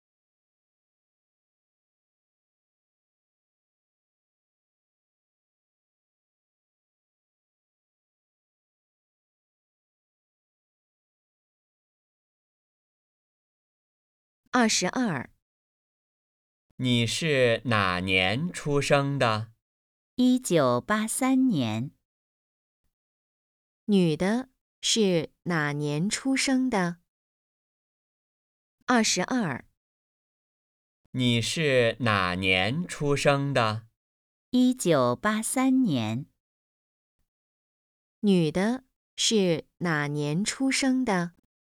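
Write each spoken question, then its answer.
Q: 女的是哪年出生的?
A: 1983年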